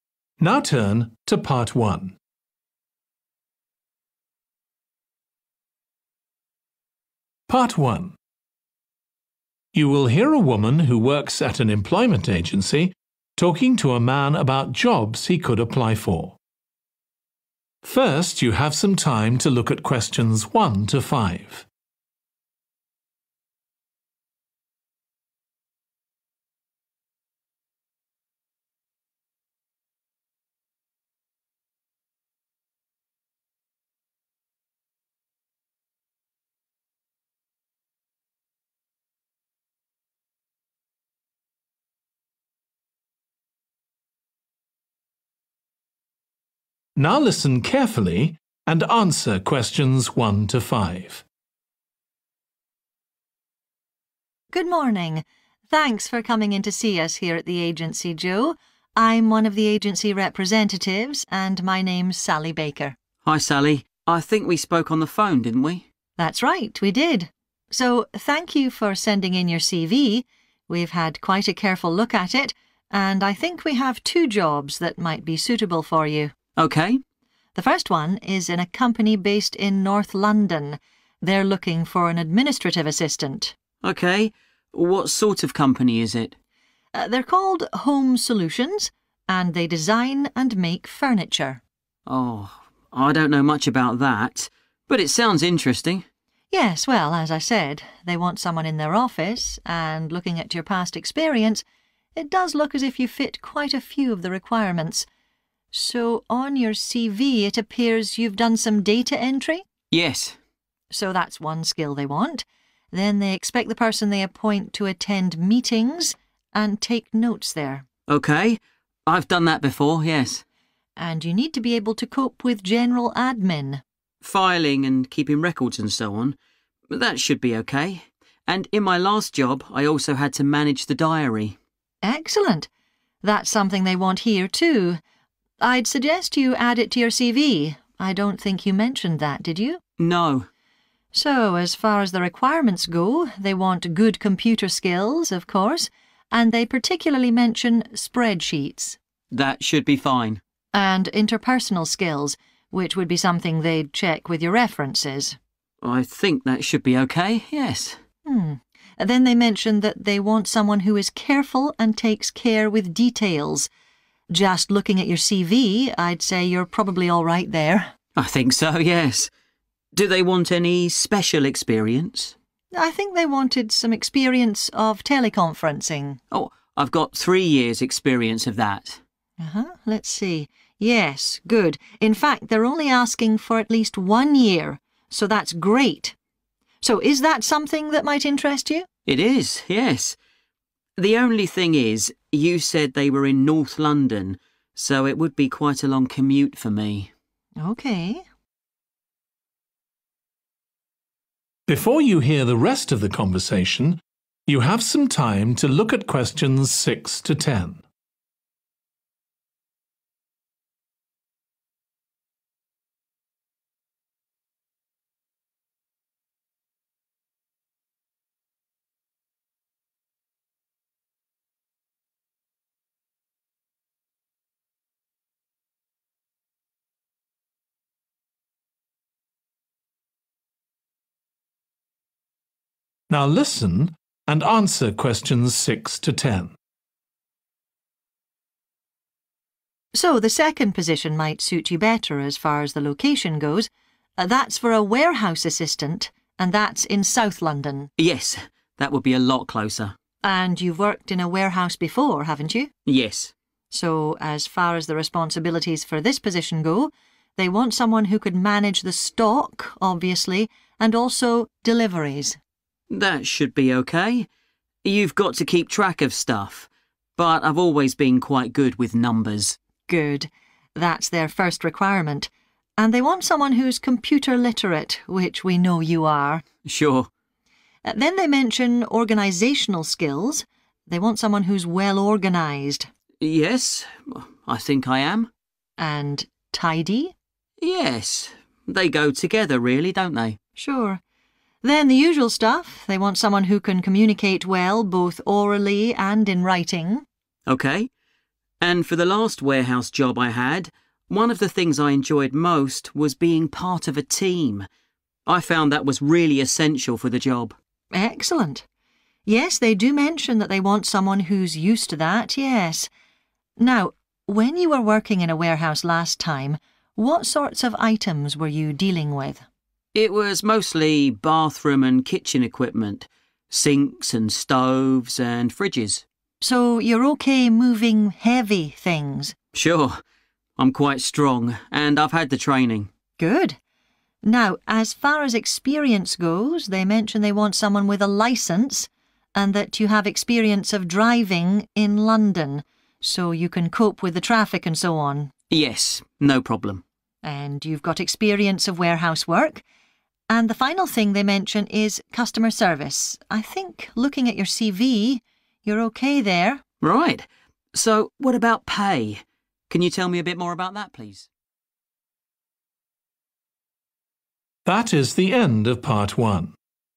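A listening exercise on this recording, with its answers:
Complete the notes below.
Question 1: Administrative assistant in a company that produces 1.............. (North London)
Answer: furniture

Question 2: go to 2 .............and take notes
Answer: meetings

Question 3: management of 3 ..............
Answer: diary

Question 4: attention to 4 ..............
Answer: detail

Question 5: need a minimum of 5 ............ of experience of teleconferencing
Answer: one year

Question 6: managing 6 .............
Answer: deliveries

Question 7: very organised and 7 ............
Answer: tidy

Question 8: used to working in a 8 .............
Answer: team

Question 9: able to cope with items that are 9 ..............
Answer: heavy

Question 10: 10 ............service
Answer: customer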